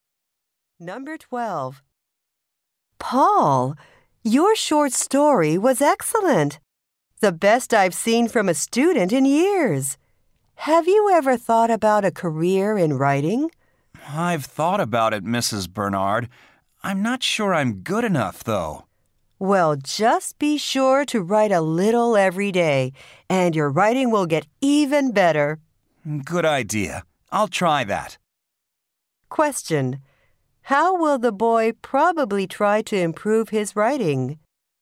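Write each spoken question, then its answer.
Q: How will the boy probably try to improve his writing?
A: By writing a little every day.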